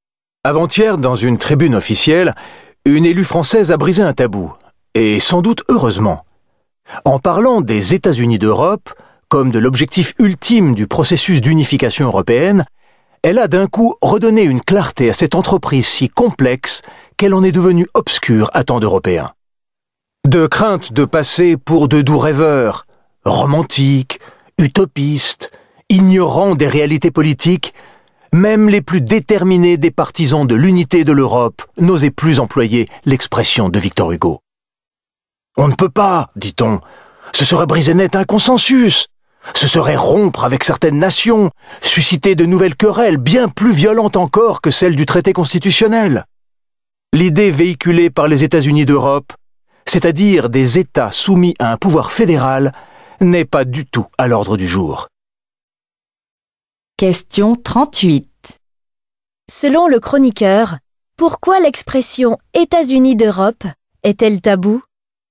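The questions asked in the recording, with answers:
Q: Selon le chroniqueur, pourquoi l'expression « États-Unis d'Europe » est-elle taboue ?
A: Par crainte de passer pour des rêveurs et de briser le consensus entre nations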